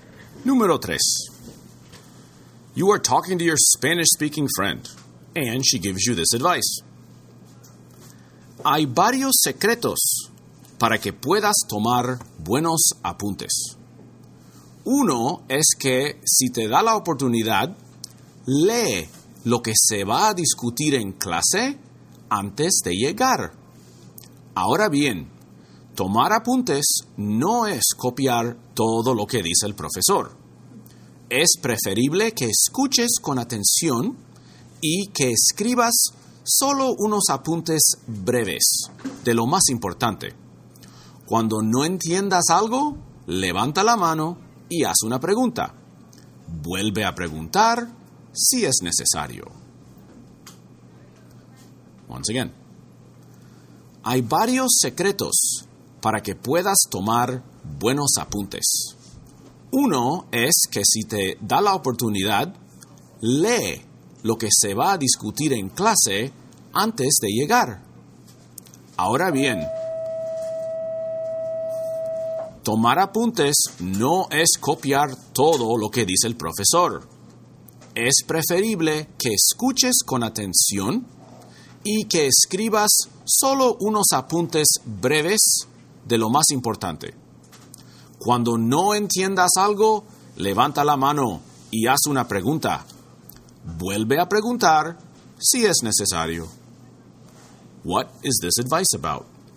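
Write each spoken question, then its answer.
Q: What is this advice about?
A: How to take good notes in class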